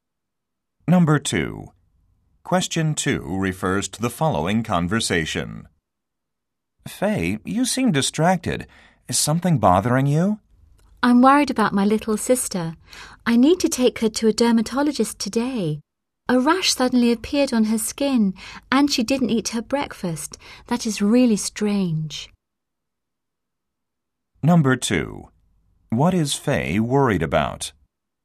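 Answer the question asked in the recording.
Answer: Her little sister, who has a rash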